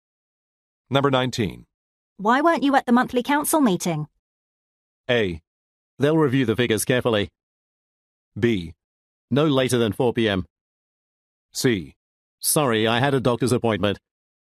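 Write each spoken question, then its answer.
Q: Why weren't you at the monthly council meeting?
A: C: Sorry, I had a doctor's appointment.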